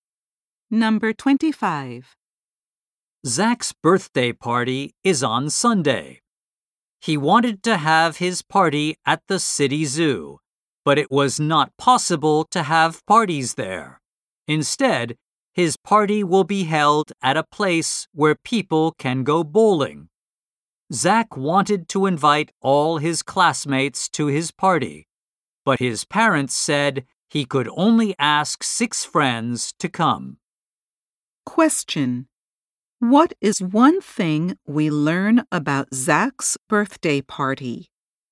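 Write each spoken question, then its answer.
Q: What is one thing we learn about Zach's birthday party?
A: It will be held at a bowling place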